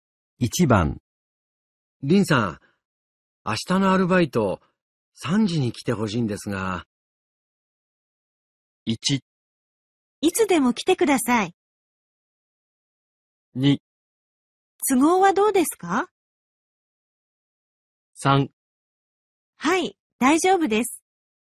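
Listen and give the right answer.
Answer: 3: はい、大丈夫です。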